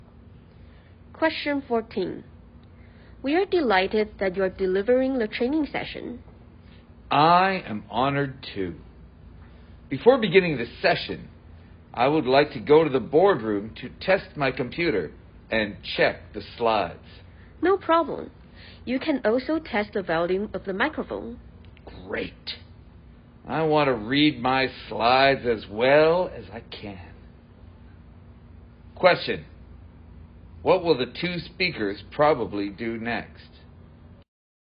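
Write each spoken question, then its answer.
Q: What will the two speakers probably do next?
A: Go to the boardroom to test the computer, slides and microphone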